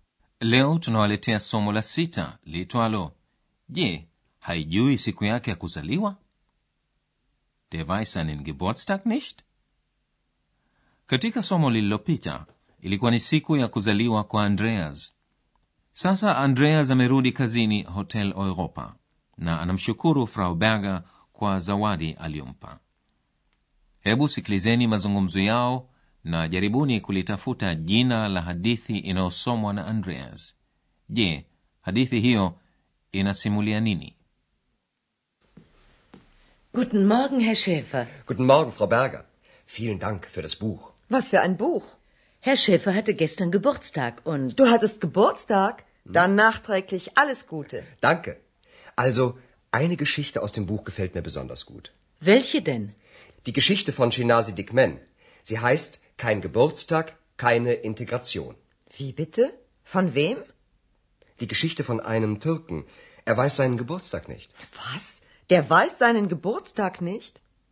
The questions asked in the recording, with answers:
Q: jaribuni kulitafuta jina la hadithi inayosomwa na andreas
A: Jina la hadithi hiyo ni hakuna siku ya kuzaliwa, hakuna mwingiliano, yani kein Geburtstag, keine Integration.

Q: je hadithi hiyo Ina Simulianini.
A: Ni hadithi juu ya Mturuki Turka ambaye haijui tarehe ya siku aliyozaliwa.